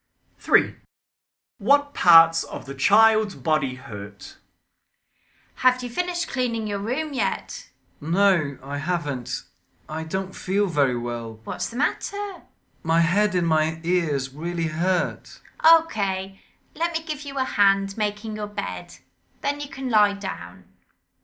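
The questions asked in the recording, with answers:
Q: What parts of the child's body hurt?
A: Head and ears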